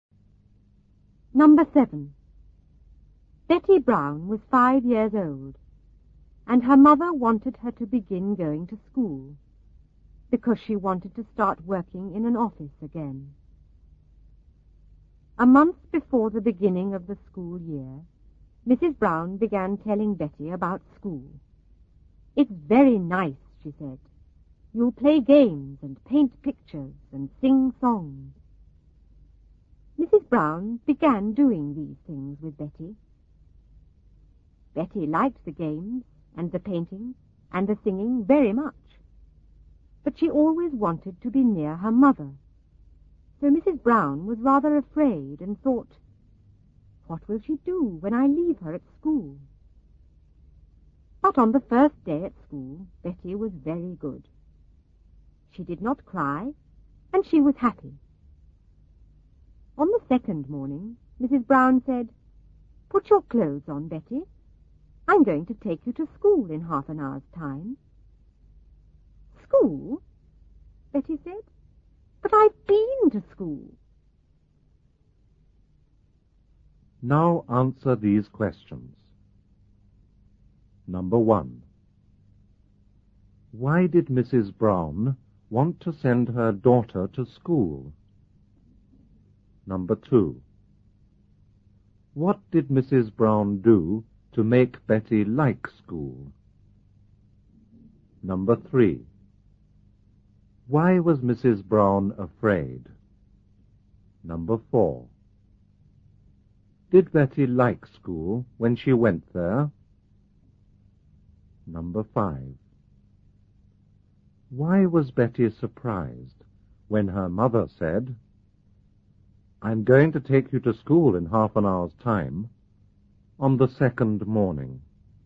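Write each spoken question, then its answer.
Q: Why did Mrs. Brown want to send her daughter to school?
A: Because she wanted to start working in an office again.

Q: What did Mrs. Brown do to make Betty like school?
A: She told Betty about school and played games, painted pictures and sang songs with her.

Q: Why was Mrs. Brown afraid?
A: Because Betty always wanted to be near her mother, so she worried what Betty would do when left at school.

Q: Did Betty like school when she went there?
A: Yes, she did not cry and was happy.

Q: Why was Betty surprised when her mother said, "I'm going to take you to school in half an hour's time," on the second morning?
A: Because she thought she had already been to school and didn't need to go again.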